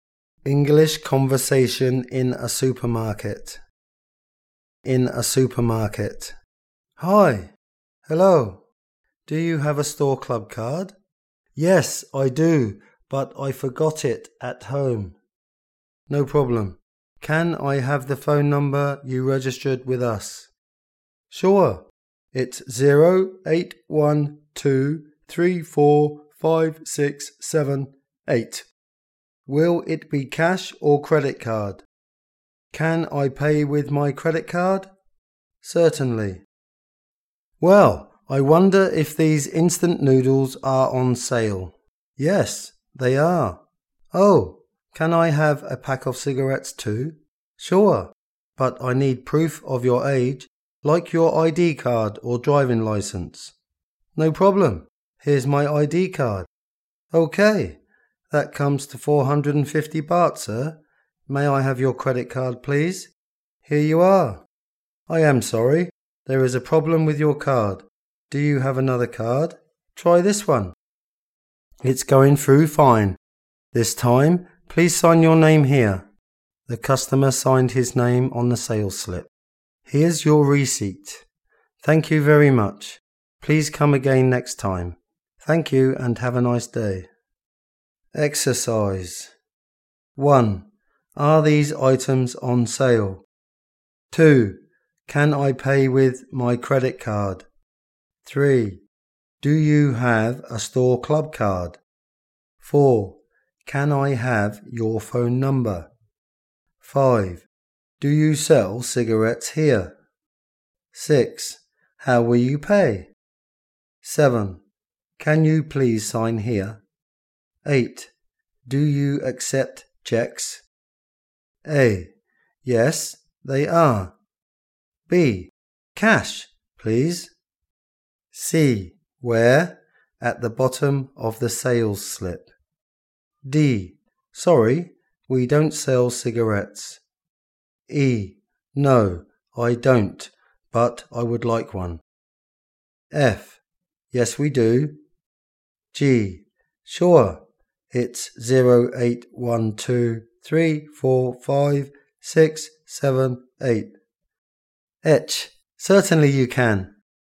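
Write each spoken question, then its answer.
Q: Are these items on sale?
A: A: Yes, they are.

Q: Can I pay with my credit card?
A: H: Certainly you can.

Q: Do you have a store club card?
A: E: No, I don't, but I would like one.

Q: Can I have your phone number?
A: G: Sure, it's 0812345678.

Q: How will you pay?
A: B: Cash, please.

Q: Can you please sign here?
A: C: Where? At the bottom of the sales slip.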